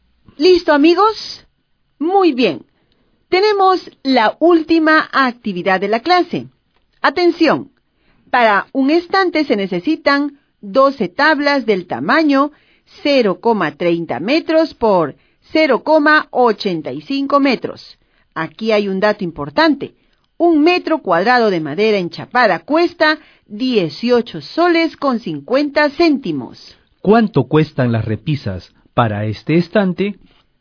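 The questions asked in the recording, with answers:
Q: ¿Cuánto cuestan las repisas para este estante?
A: 56,61 soles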